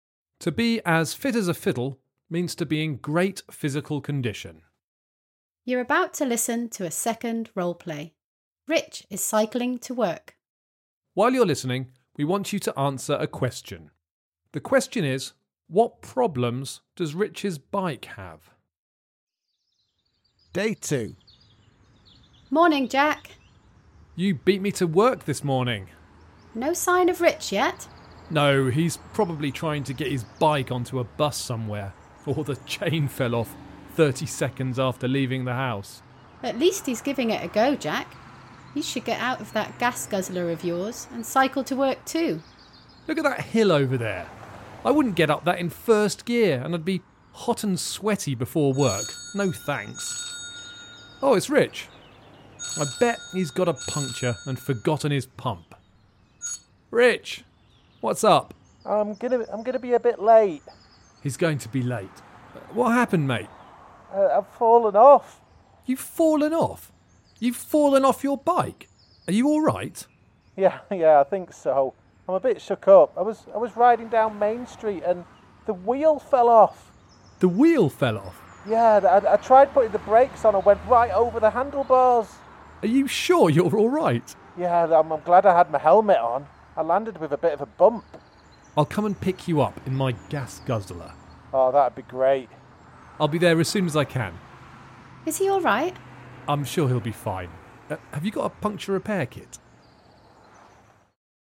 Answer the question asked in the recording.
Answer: Well, he had an accident because a wheel fell off his bike.